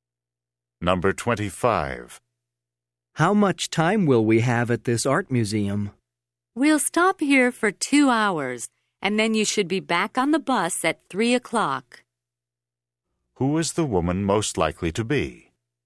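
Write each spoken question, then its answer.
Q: Who is the woman most likely to be?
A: A tour guide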